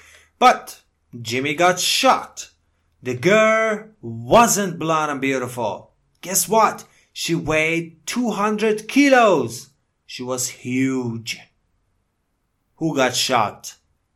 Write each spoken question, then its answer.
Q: Who got shot?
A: Jimmy. Jimmy got shot.